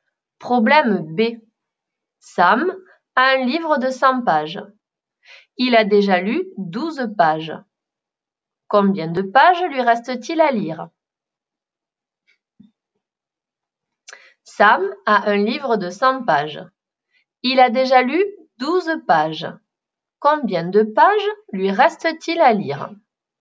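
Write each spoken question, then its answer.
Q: Combien de pages lui reste-t-il à lire?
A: 88 pages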